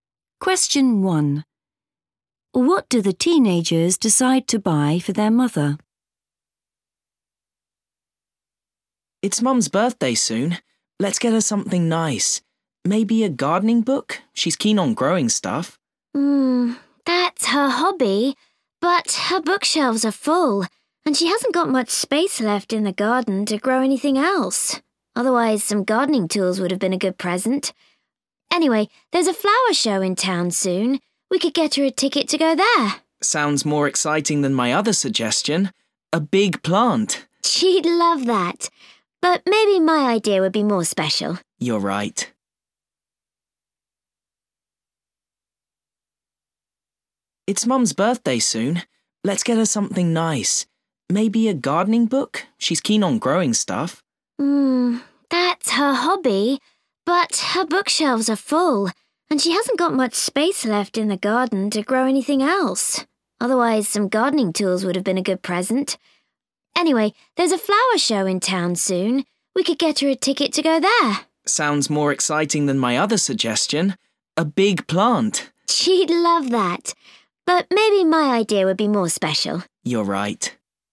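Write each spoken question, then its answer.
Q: What do the teenagers decide to buy for their mother?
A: a ticket to the flower show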